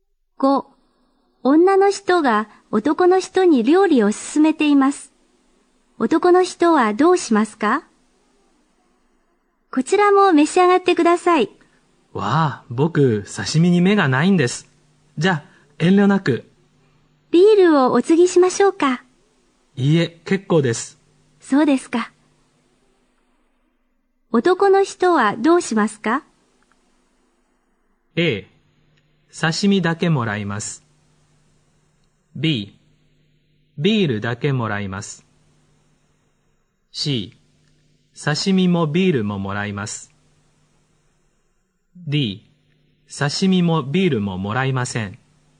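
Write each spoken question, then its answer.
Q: 男の人はどうしますか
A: A: 刺身だけもらいます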